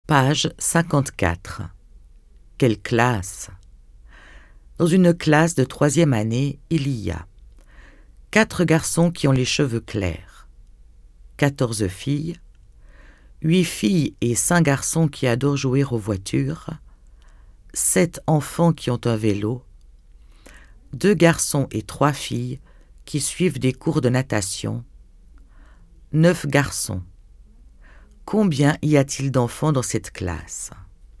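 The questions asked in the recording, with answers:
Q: Combien y a-t-il d'enfants dans cette classe ?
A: 23 enfants (14 filles et 9 garçons)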